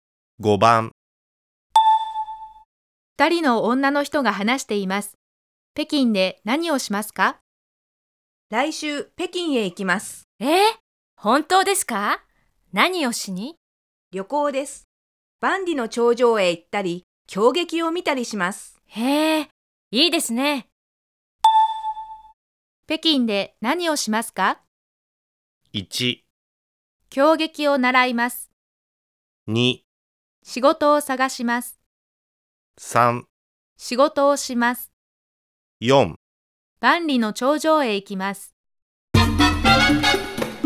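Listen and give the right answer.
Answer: 4: 万里の長城へ行きます。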